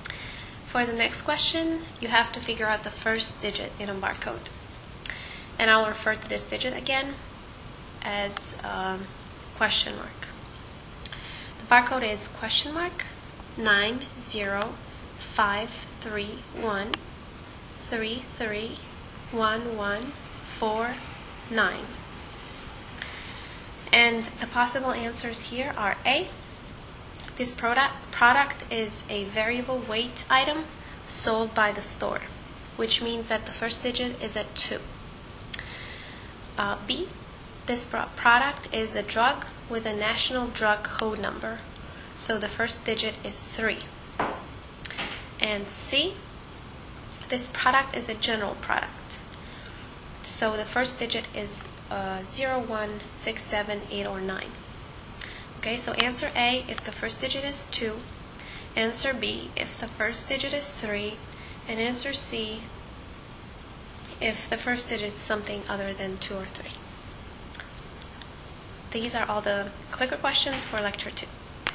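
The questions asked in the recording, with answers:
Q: For the next question, you have to figure out the first digit in a barcode.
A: B: This product is a drug with a national drug code number, so the first digit is 3.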